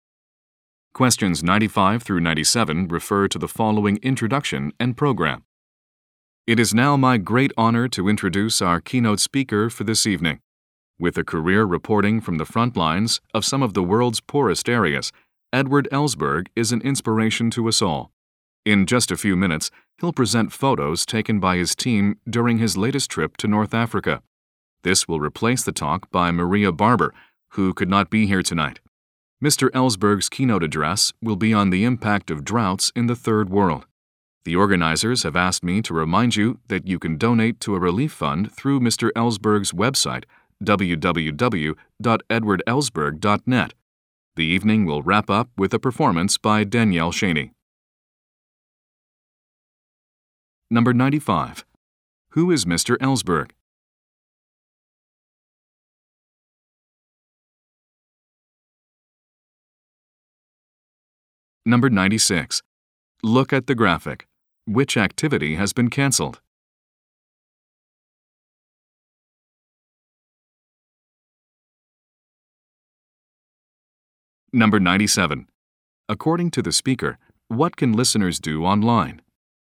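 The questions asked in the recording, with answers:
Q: Who is Mr. Ellsberg?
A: A reporter/journalist

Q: According to the speaker, what can listeners do online?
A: Donate to a relief fund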